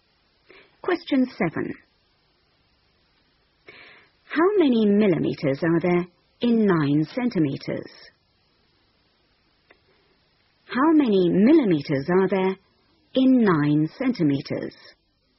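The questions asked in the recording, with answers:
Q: How many millimeters are there in 9 centimeters?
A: 90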